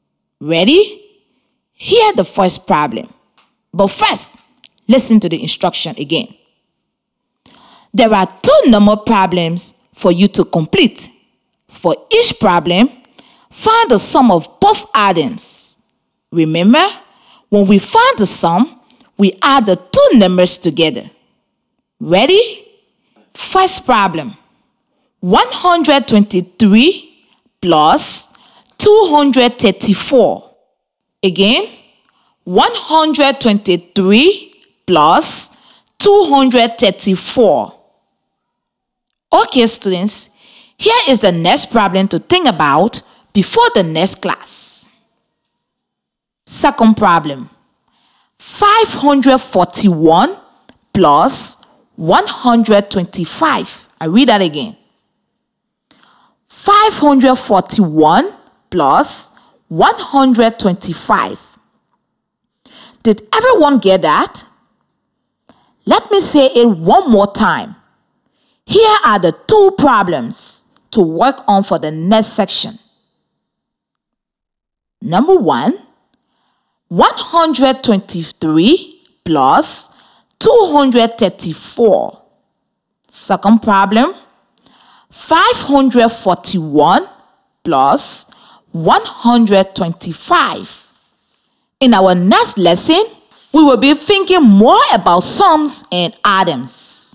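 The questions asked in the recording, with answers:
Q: 123 plus 234.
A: 357

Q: 541 plus 125.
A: 666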